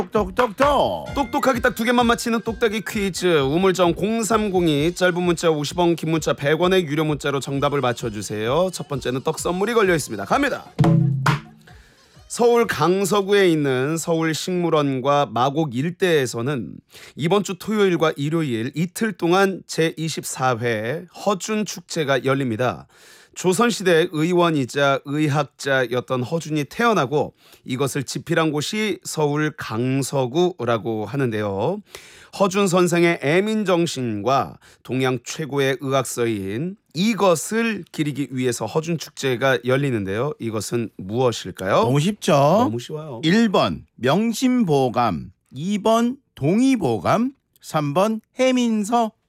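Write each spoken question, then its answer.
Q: 이것은 무엇일까요?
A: 2번: 동의보감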